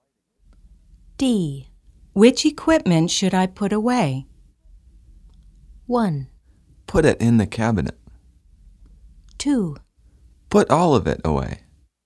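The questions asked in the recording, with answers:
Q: Which equipment should I put away?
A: 2: Put all of it away.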